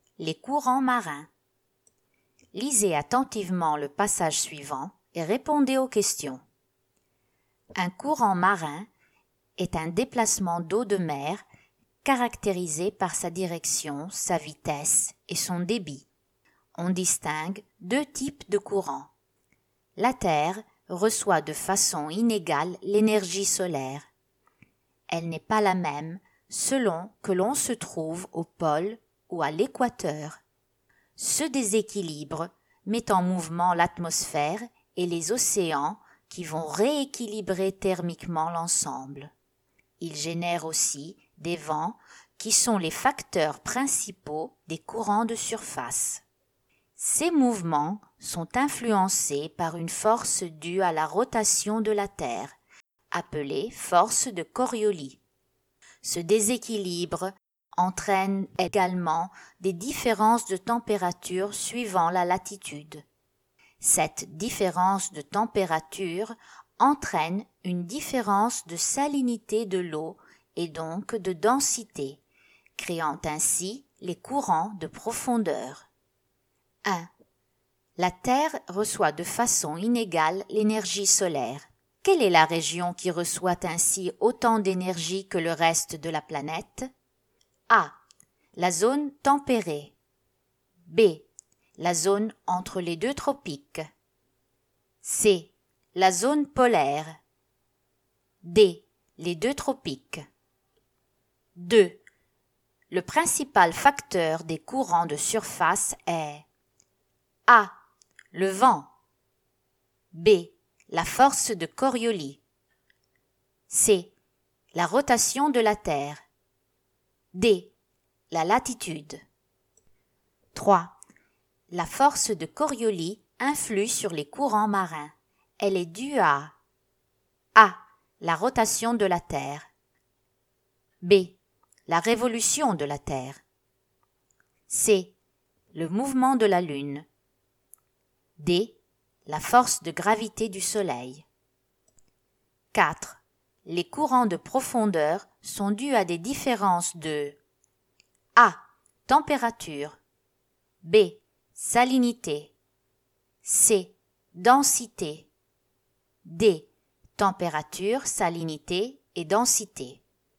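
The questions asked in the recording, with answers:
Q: Le principal facteur des courants de surface est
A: A: Le vent.

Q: La force de Coriolis influe sur les courants marins. Elle est due à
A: A: La rotation de la Terre.

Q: Les courants de profondeur sont dus à des différences de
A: D: Température, salinité et densité.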